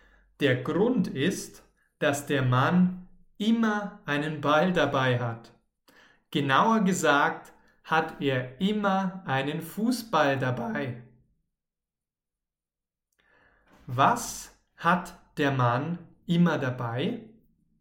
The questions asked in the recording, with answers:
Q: Was hat der Mann immer dabei?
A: Einen Ball, klar. Der Mann mit dem Ball hat immer einen Ball dabei.